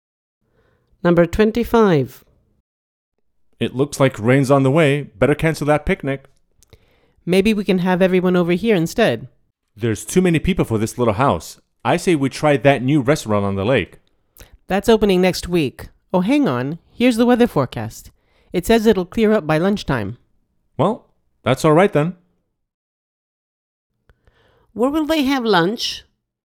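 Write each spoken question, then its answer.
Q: Where will they have lunch?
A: At the picnic, outdoors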